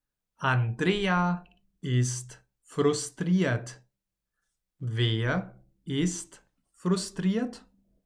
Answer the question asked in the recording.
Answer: Andrea. Sie ist frustriert.